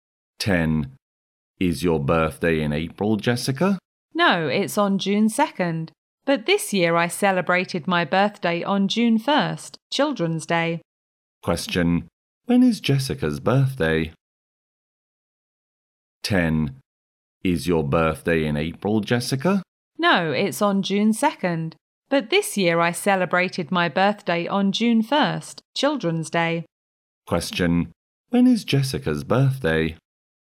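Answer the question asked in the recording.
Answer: June 2nd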